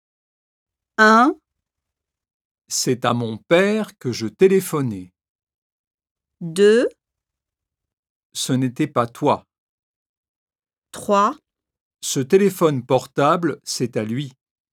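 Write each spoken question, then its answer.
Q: À qui téléphonais-tu?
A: 1: C'est à mon père que je téléphonais.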